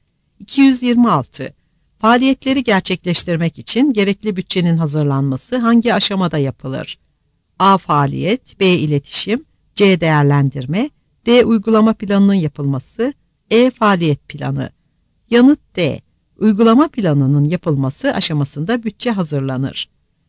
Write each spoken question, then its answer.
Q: Faaliyetleri gerçekleştirmek için gerekli bütçenin hazırlanması hangi aşamada yapılır?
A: Yanıt D.